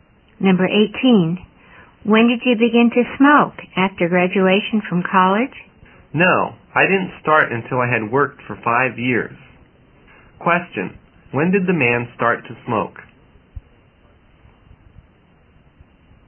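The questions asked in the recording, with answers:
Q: when did the man start to smoke?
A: After he had worked for 5 years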